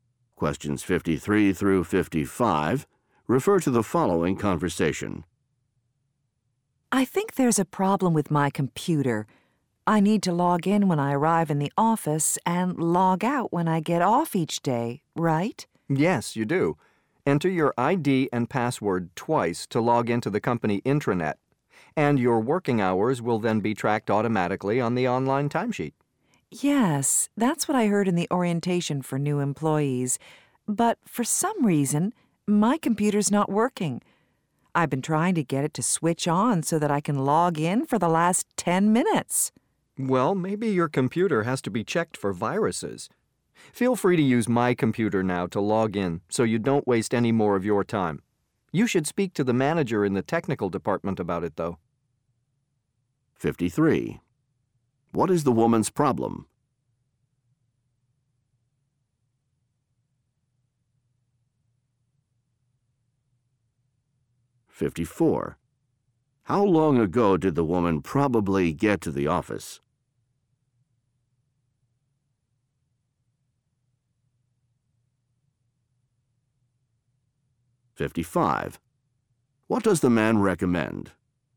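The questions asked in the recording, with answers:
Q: What is the woman's problem?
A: Her computer won't switch on

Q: How long ago did the woman probably get to the office?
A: About 10 minutes ago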